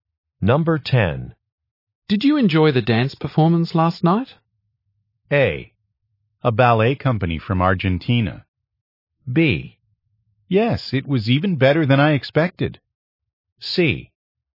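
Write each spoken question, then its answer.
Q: Did you enjoy the dance performance last night?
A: B: Yes, it was even better than I expected.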